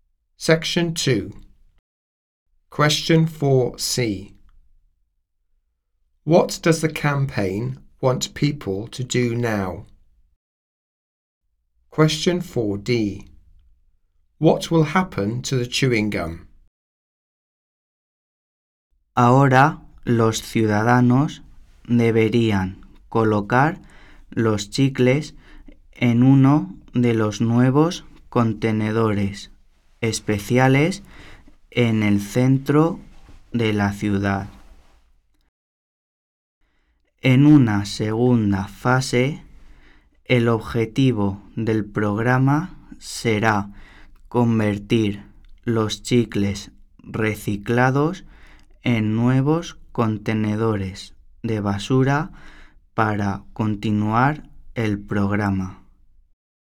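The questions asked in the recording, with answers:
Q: What does the campaign want people to do now?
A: Put gum in the new special bins in the city centre

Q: What will happen to the chewing gum?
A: It will be turned into new rubbish bins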